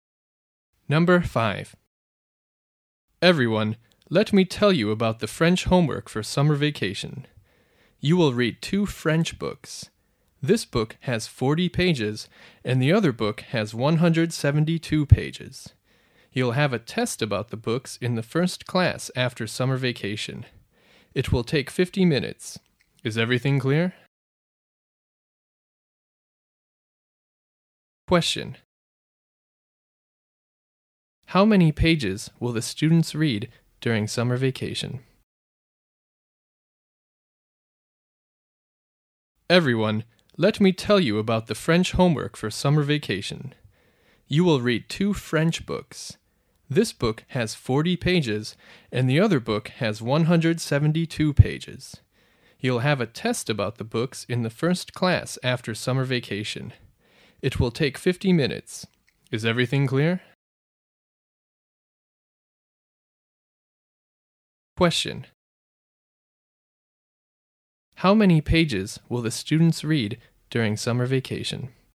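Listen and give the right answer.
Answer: 212 pages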